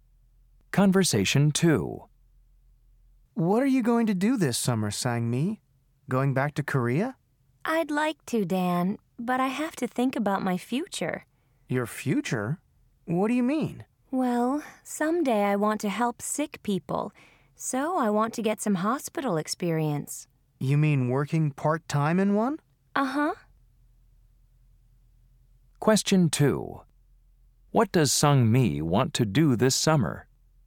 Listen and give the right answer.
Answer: If you want to work in a hospital, you should visit County General Hospital.